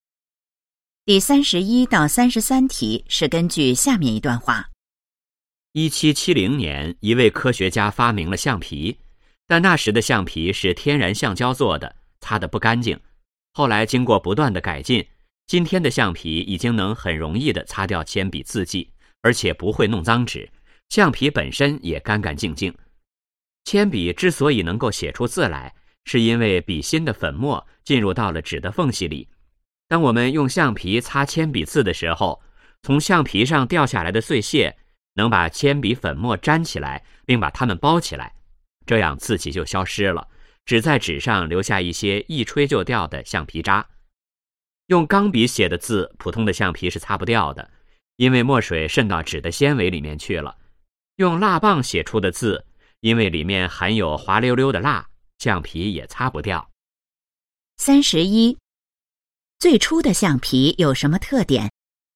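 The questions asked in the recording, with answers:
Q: 最初的橡皮有什么特点?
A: 用天然橡胶做的,擦得不干净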